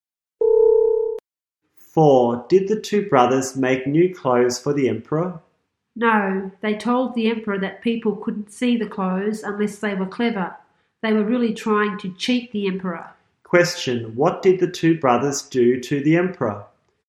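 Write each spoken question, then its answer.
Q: What did the two brothers do to the emperor?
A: They tried to cheat him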